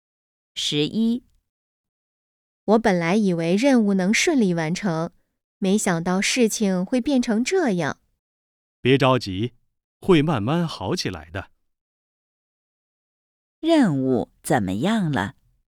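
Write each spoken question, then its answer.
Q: 任务怎么样了?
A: 没有顺利完成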